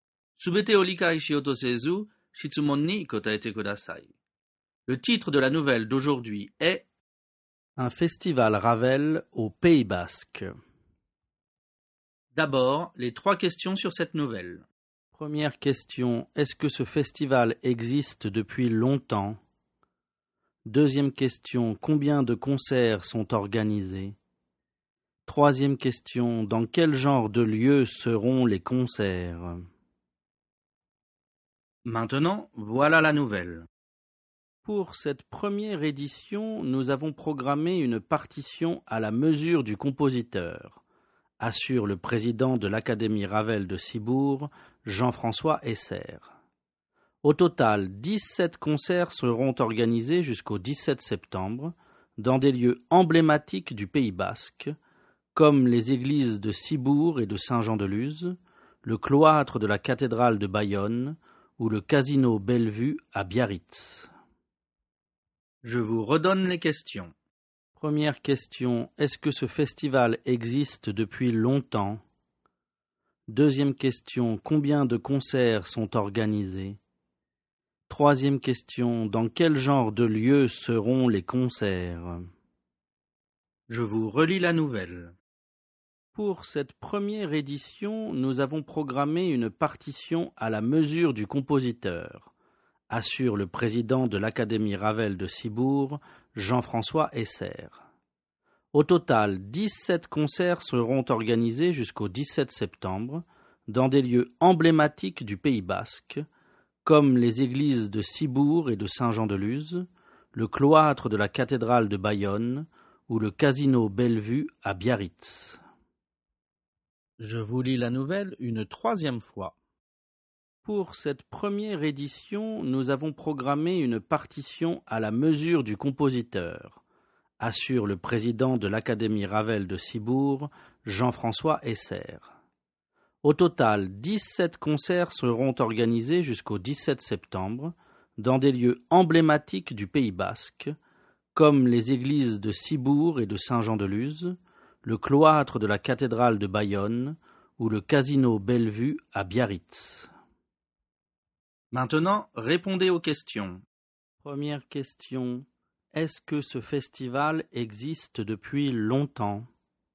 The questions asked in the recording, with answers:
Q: est-ce que ce festival existe depuis longtemps?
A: Réponse, non, il est tout nouveau.

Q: combien de concerts sont organisés?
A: Réponse, il y aura 17 concerts.

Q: dans quel genre de lieu seront les concerts?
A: Réponse. Les concerts auront lieu dans des lieux emblématiques du Pays Basque.